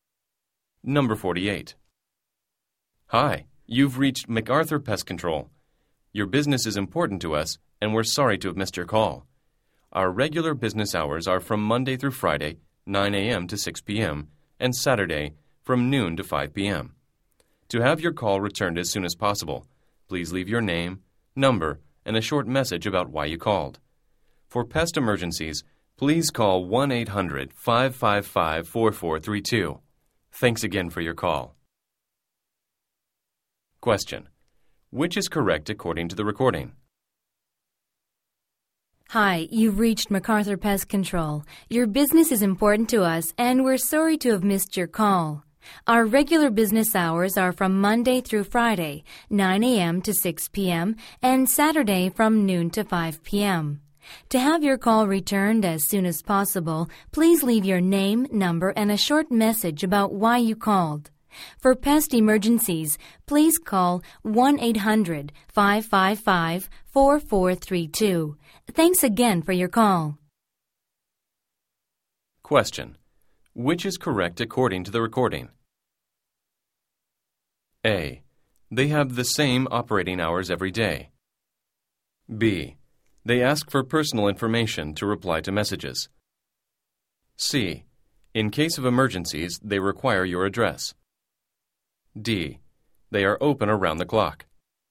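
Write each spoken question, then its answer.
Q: Which is correct according to the recording?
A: B: They ask for personal information to reply to messages.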